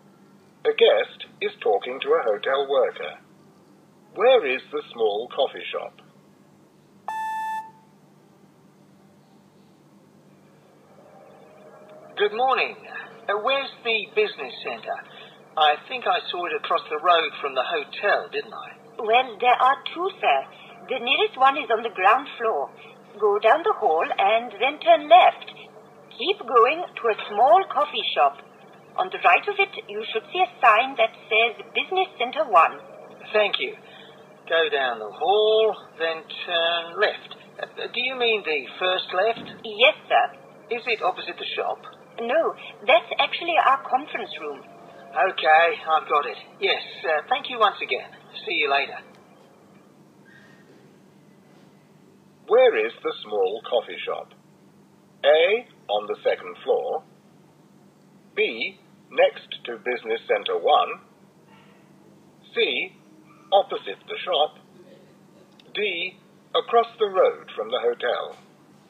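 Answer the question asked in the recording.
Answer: B: next to Business Center 1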